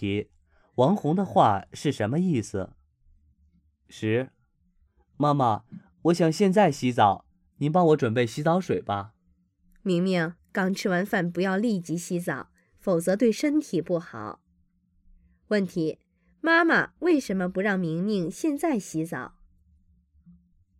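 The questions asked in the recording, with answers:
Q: 妈妈为什么不让明明现在洗澡?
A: 刚吃完饭立即洗澡对身体不好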